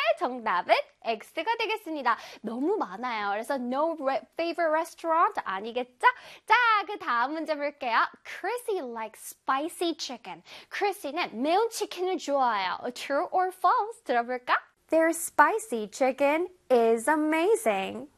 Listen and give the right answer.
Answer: True가 되겠습니다.